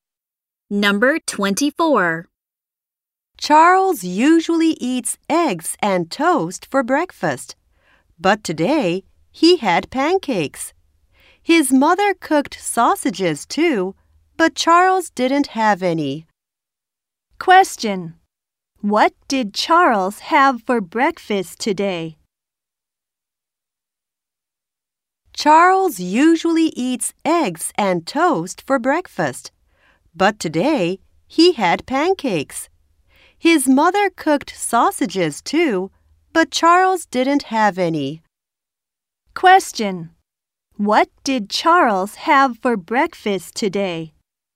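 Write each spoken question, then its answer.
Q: What did Charles have for breakfast today?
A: Pancakes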